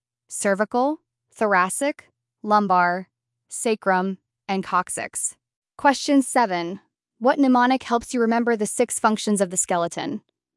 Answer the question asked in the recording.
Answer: SPAM B, support, protection, attachment for muscles, movement, mineral storage, blood cell production.